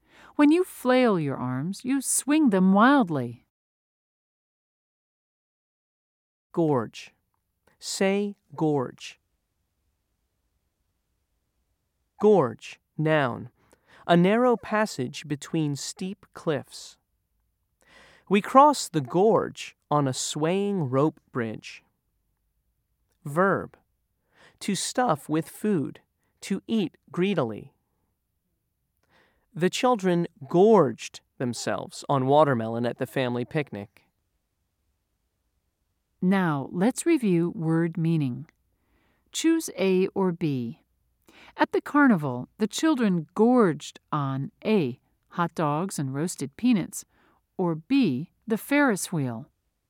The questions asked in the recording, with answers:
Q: Choose A or B. At the carnival, the children gorged on A, hot dogs and roasted peanuts, or B, the Ferris wheel.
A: If you said A, you were right.